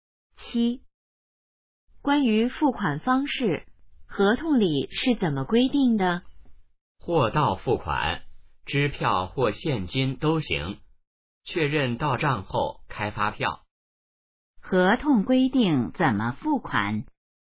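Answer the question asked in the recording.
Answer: 货到付款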